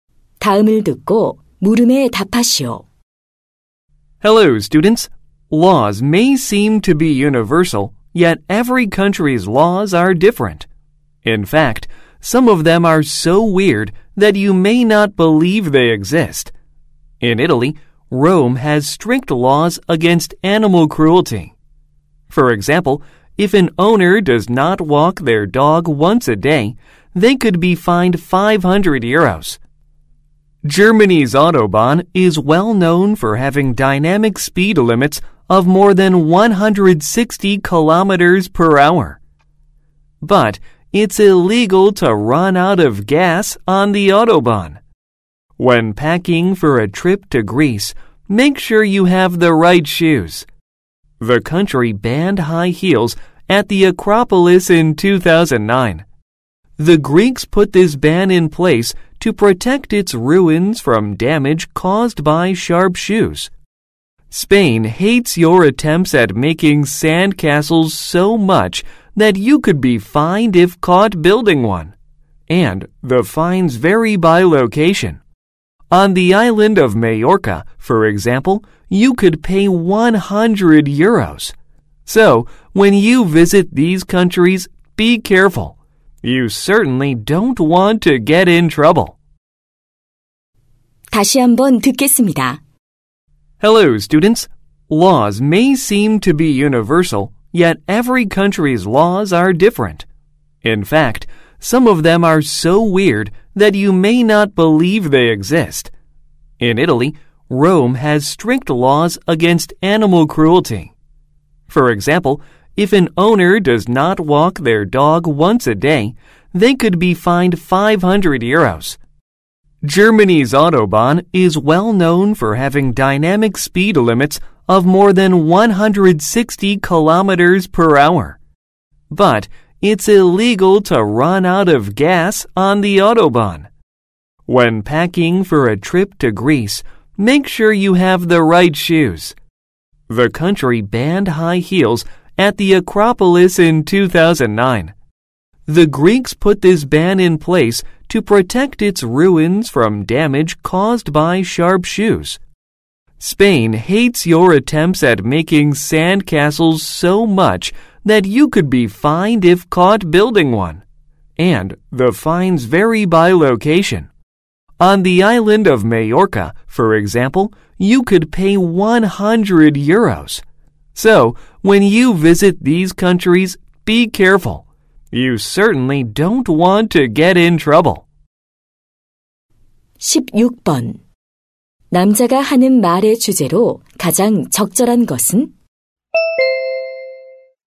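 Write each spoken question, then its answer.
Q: 남자가 하는 말의 주제로 가장 적절한 것은?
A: 여러 나라의 이상한 법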